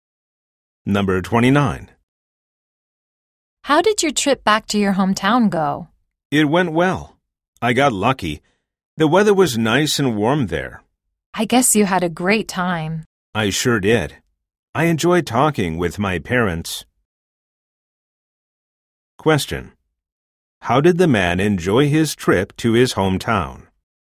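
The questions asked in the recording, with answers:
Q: How did the man enjoy his trip to his hometown?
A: He enjoyed talking with his parents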